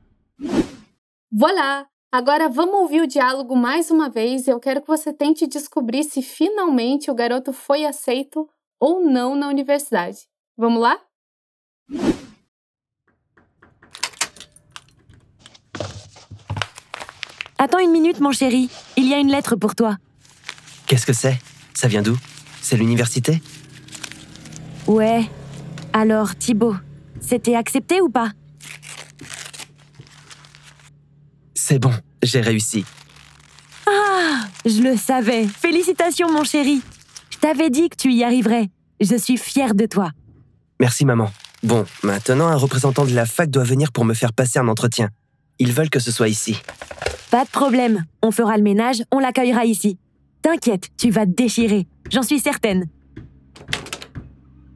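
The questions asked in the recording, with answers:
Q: Eu quero que você tente descobrir se finalmente o garoto foi aceito ou não na universidade.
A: Sim, ele foi aceito (C'est bon, j'ai réussi).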